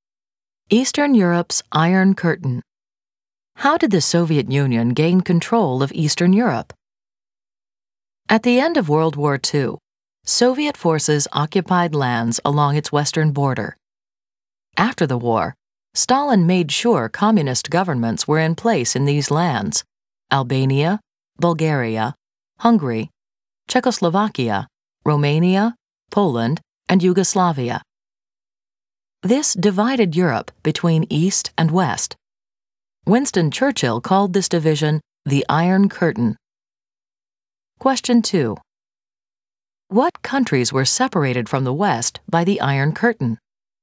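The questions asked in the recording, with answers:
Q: What countries were separated from the West by the Iron Curtain?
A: Albania, Bulgaria, Hungary, Czechoslovakia, Romania, Poland, and Yugoslavia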